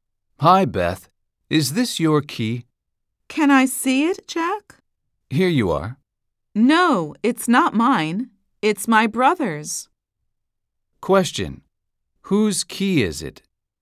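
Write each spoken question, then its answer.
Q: Whose key is it?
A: Beth's brother's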